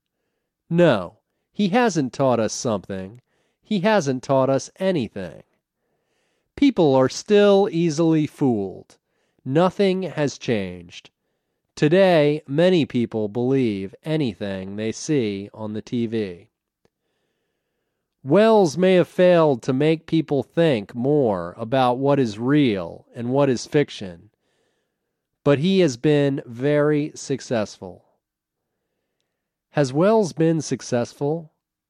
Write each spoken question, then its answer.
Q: Has Welles been successful?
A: Yes, Welles has been very successful.